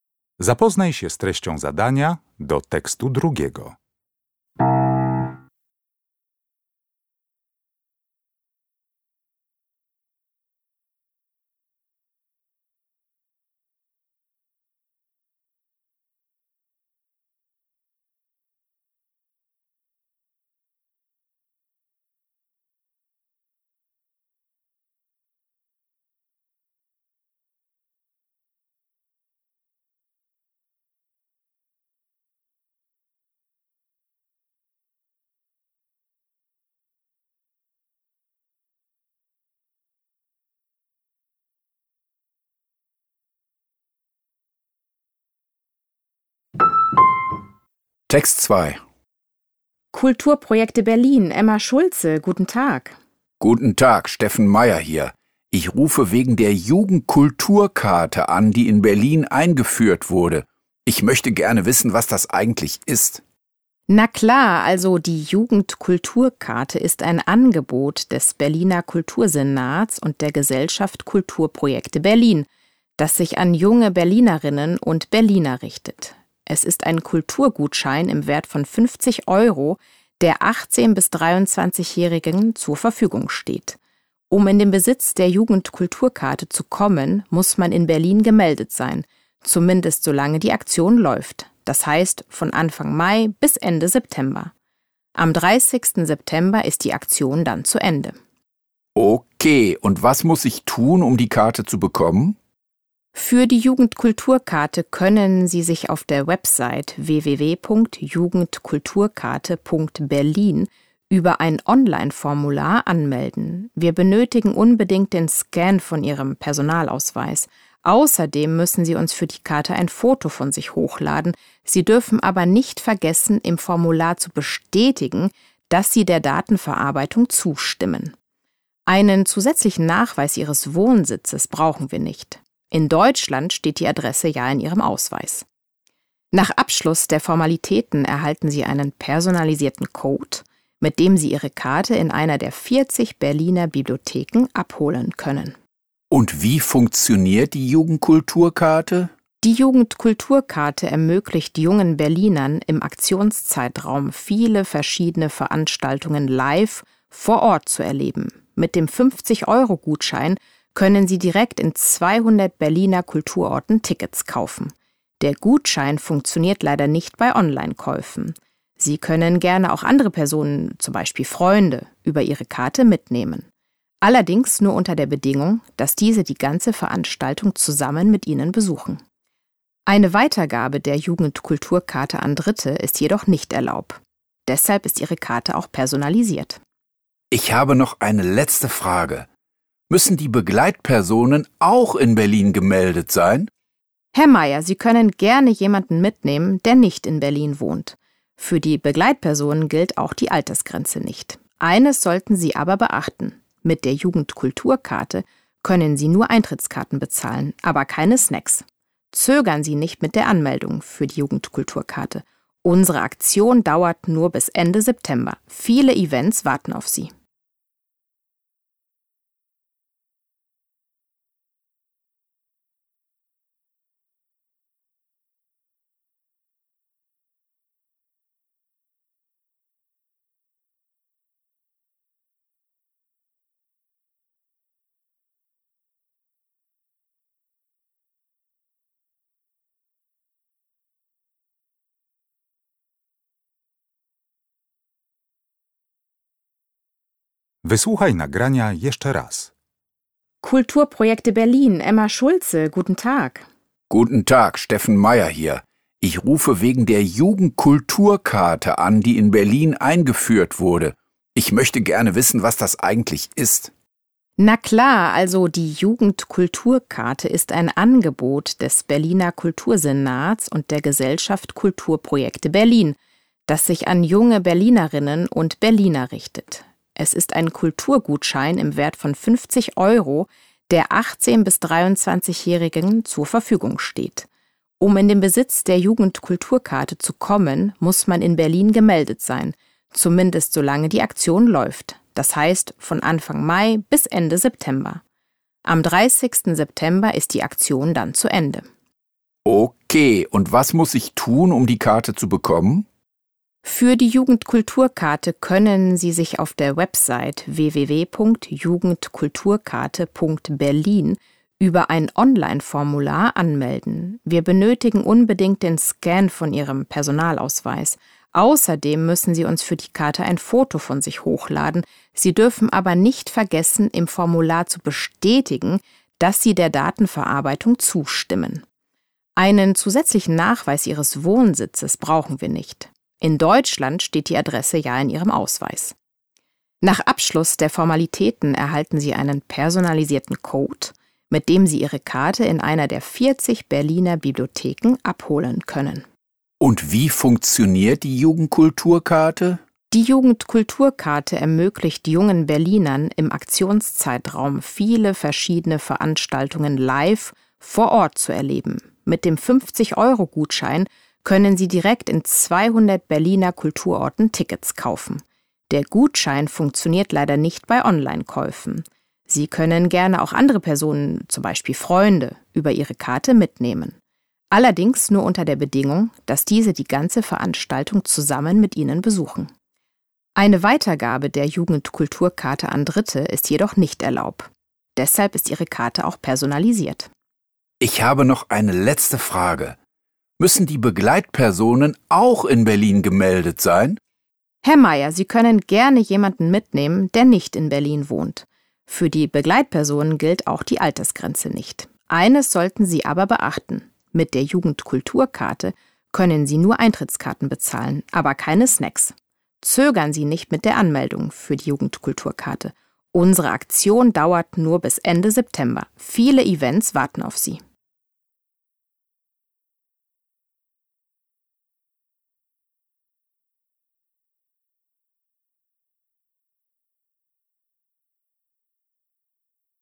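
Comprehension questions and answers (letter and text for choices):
W zadaniach 1.3.–1.6. zaznacz jedną z liter: A, B, C albo D.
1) An wen ist die Jugendkulturkarte gerichtet?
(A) An Berlinerinnen und Berliner unter 18 Jahren.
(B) An junge Menschen, die als Touristen nach Berlin kommen.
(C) An Personen zwischen 18 und 23 Jahren mit Wohnsitz in Berlin.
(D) An junge Erwachsene, die in der Gesellschaft Kulturprojekte Berlin mitwirken.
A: (C) An Personen zwischen 18 und 23 Jahren mit Wohnsitz in Berlin.

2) Was wird bei der Registrierung für die Jugendkulturkarte nicht verlangt?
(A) Ein Foto von sich.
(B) Der Scan des Personalausweises.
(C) Eine zusätzliche Meldebestätigung.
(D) Die Zustimmung zur Datenverarbeitung.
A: (C) Eine zusätzliche Meldebestätigung.

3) Wann darf der Besitzer der Jugendkulturkarte eine andere Person zu einem Event mitnehmen?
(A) Wenn er die ganze Zeit dabei ist.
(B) Wenn er die Tickets online kauft.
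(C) Wenn die andere Person in Berlin gemeldet ist.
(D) Wenn er eine zweite Karte für die Begleitperson anfordert.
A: (A) Wenn er die ganze Zeit dabei ist.

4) Welche Intention verfolgt Frau Schulze bei der Antwort auf die letzte Frage?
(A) Sie rät Herrn Meyer, sich möglichst schnell in Berlin anzumelden.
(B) Sie lädt Herrn Meyer zu einem besonderen Event im September ein.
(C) Sie schlägt Herrn Meyer vor, rechtzeitig Tickets für die Events zu besorgen.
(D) Sie empfiehlt Herrn Meyer, nicht lange mit der Registrierung für die Aktion zu warten.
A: (D) Sie empfiehlt Herrn Meyer, nicht lange mit der Registrierung für die Aktion zu warten.

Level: Poziom: rozszerzony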